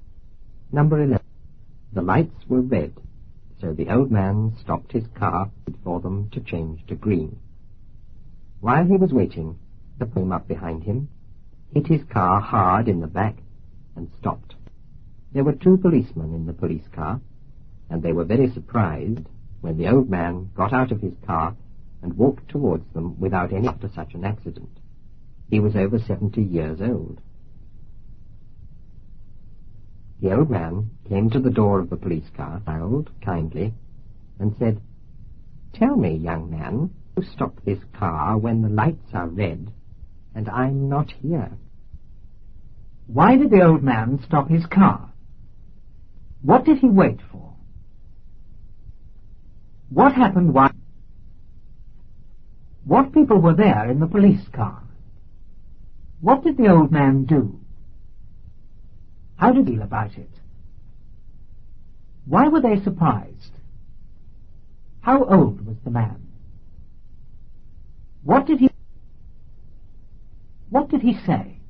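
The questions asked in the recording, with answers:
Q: Why did the old man stop his car?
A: Because the lights were red

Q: What did he wait for?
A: For the lights to change to green

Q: What people were there in the police car?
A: Two policemen

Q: How old was the man?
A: Over 70 years old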